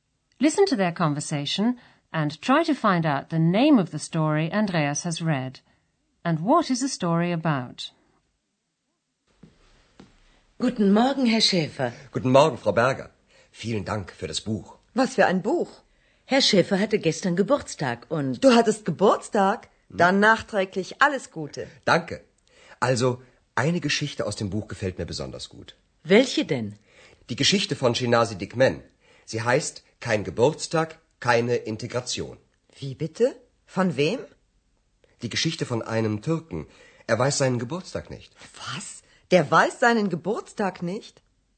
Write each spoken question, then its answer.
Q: Listen to their conversation and try to find out the name of the story Andreas has read.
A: The story is called Kein Geburtstag, keine Integration, which means literally no birthday, no integration.

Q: And what is the story about?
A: It's the story of a Turk, ein Türke, who doesn't know the exact date of his birth.